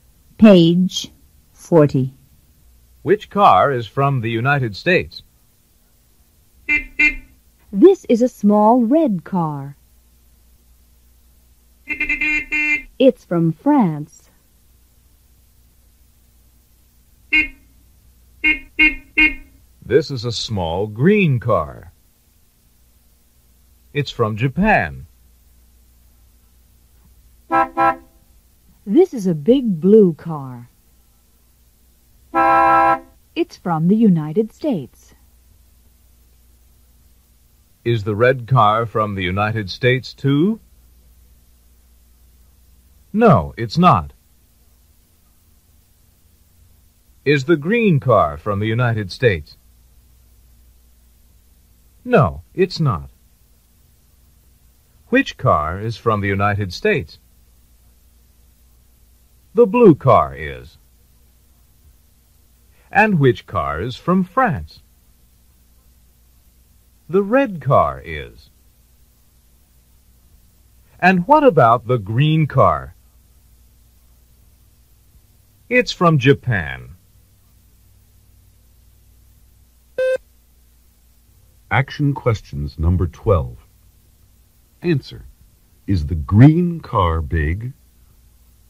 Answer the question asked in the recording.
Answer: No, it's not.